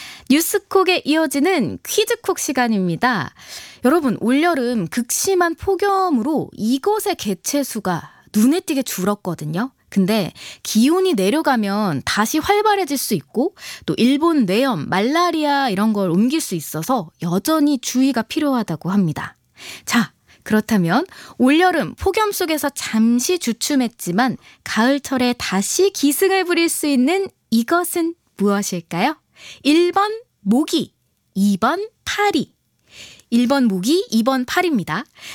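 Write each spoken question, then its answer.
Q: 자, 그렇다면 올여름 폭염 속에서 잠시 주춤했지만 가을철에 다시 기승을 부릴 수 있는 이것은 무엇일까요?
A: 1번: 모기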